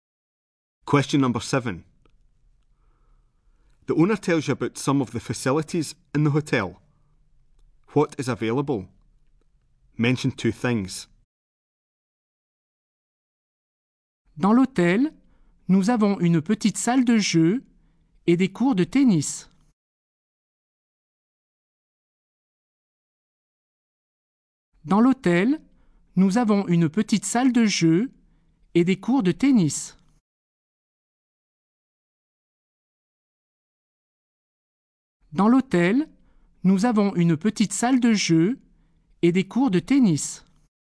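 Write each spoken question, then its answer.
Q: What is available? Mention two things.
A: A small games room and tennis courts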